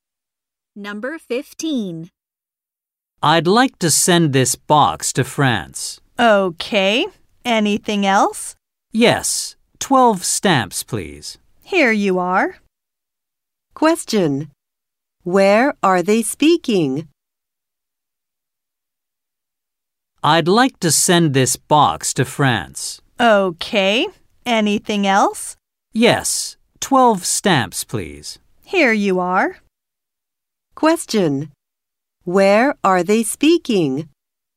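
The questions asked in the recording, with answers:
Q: Question. Where are they speaking?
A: At a post office.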